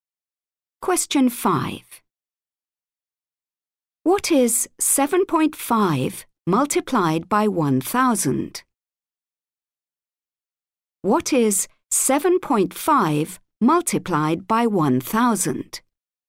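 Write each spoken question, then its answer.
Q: What is 7.5 multiplied by 1,000?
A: 7,500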